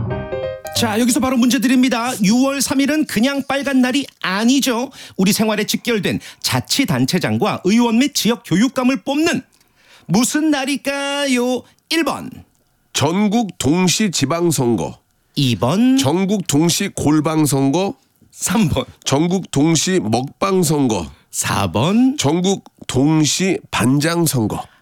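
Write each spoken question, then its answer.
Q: 우리 생활에 직결된 자치단체장과 의원 및 지역교육감을 뽑는 무슨 날일까요?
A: 1번: 전국 동시 지방선거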